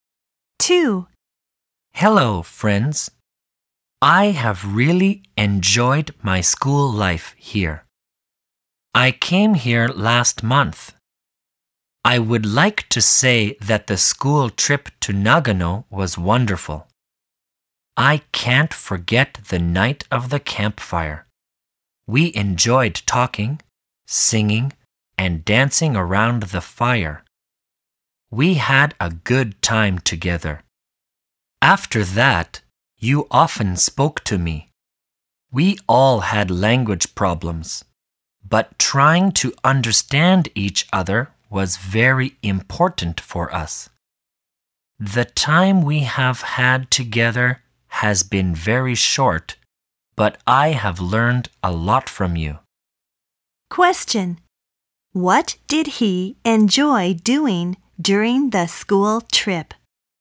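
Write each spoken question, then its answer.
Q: What did he enjoy doing during the school trip?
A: Talking, singing, and dancing around the campfire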